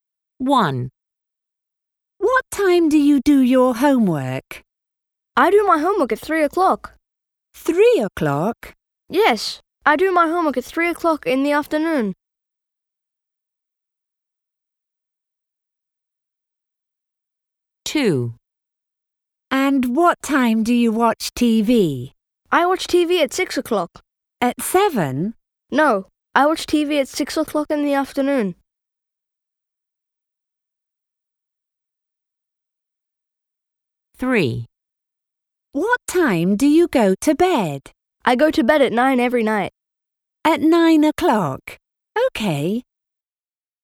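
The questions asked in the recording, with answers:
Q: What time do you do your homework?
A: 3 o'clock

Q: And what time do you watch TV?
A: 6 o'clock

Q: What time do you go to bed?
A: 9 o'clock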